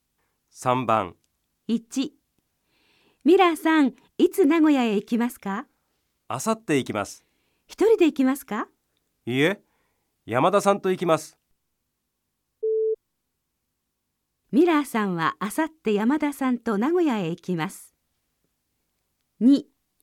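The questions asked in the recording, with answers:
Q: ミラーさんはあさって山田さんと名古屋へ行きます。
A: 正しい(○)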